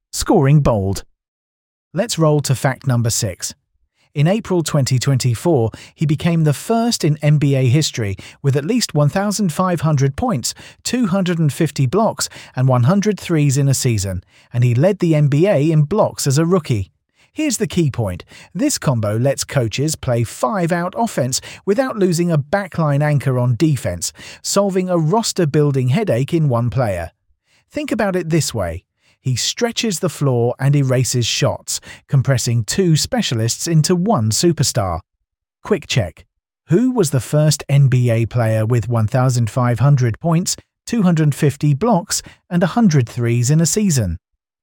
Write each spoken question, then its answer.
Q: Who was the first NBA player with 1,500 points, 250 blocks, and 100 threes in a season?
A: Correct answer, Victor Wembanyama.